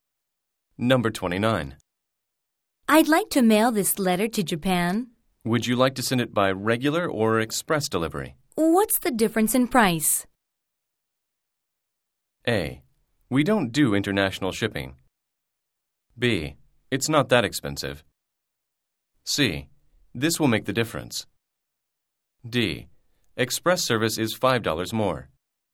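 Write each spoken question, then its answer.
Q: What's the difference in price?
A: D: Express service is $5 more.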